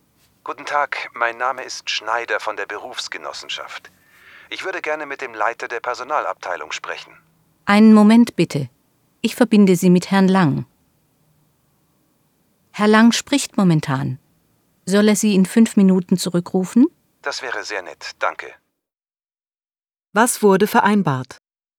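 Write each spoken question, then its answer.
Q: Was wurde vereinbart?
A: Herr Lang ruft in 5 Minuten zurück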